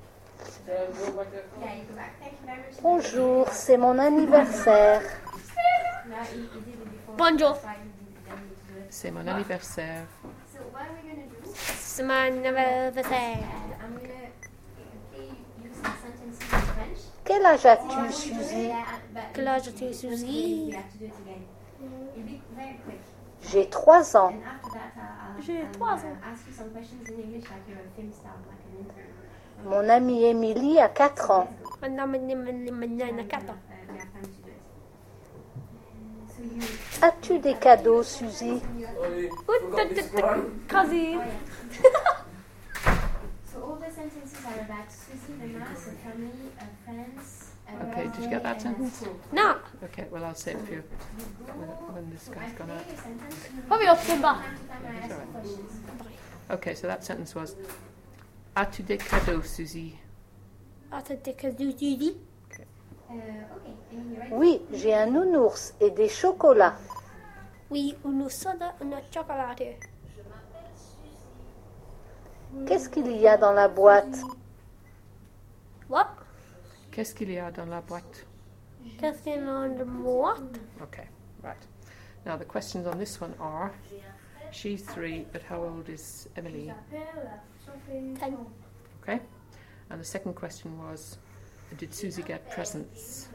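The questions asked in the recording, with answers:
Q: did Suzy get presents?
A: Yes, a teddy bear and chocolates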